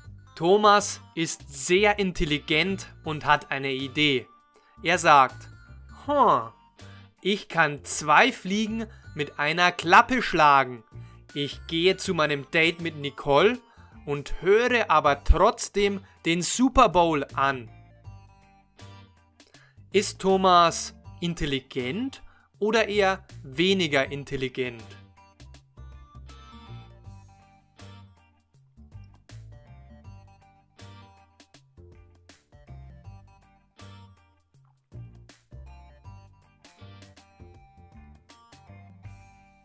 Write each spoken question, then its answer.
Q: Ist Thomas intelligent oder eher weniger intelligent?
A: Er ist sehr intelligent. Thomas ist sehr intelligent.